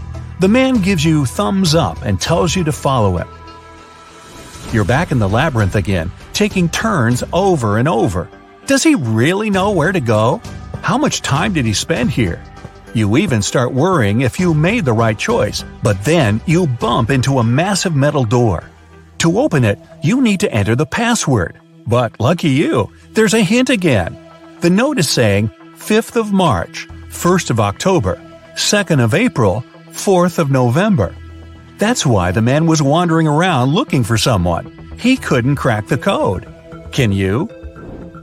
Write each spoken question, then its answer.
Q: Can you?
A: The password is HOPE.